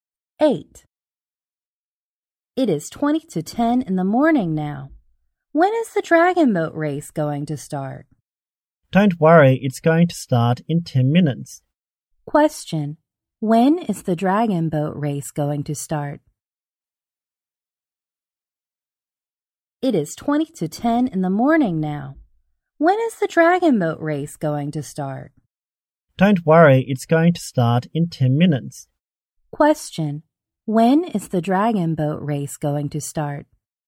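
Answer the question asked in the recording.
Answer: At 9:50 (ten to ten)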